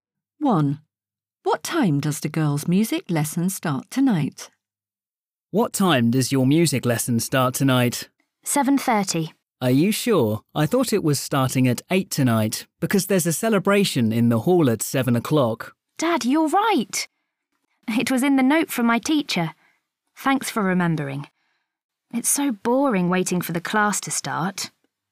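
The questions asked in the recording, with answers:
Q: What time does the girls' music lesson start tonight?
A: 8 o'clock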